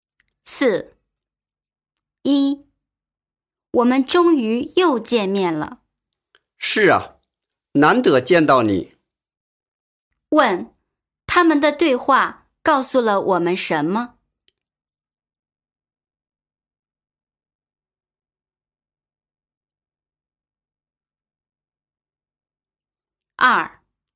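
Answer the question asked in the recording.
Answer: 他们很久没见面了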